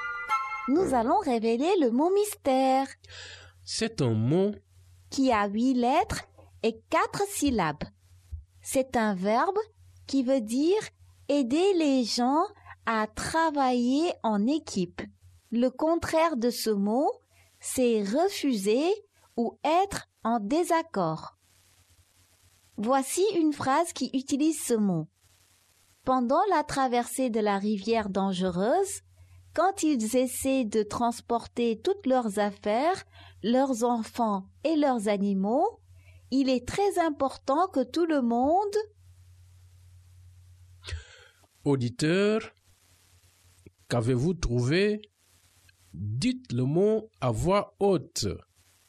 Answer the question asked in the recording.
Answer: Le mot mystère est coopérer.